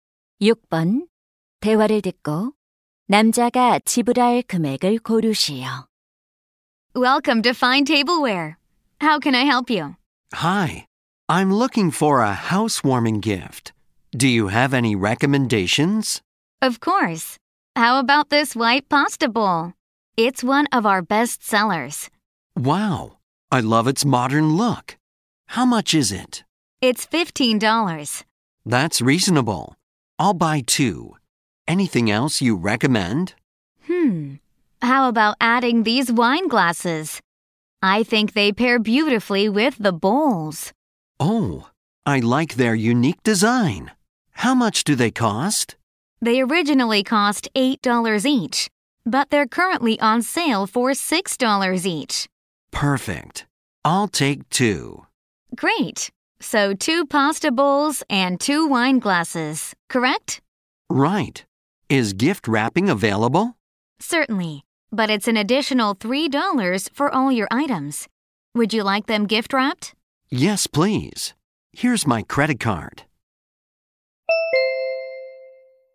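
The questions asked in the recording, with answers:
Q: 대화를 듣고 남자가 지불할 금액을 고르시오.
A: $45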